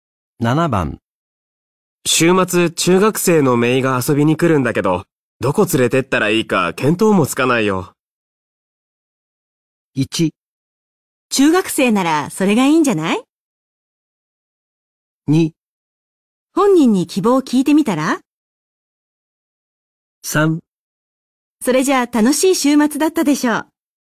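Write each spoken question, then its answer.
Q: 週末、中学生のメイが遊びに来るんだけど、どこ連れてったらいいか見当もつかないよ。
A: 2: 本人に希望を聞いてみたら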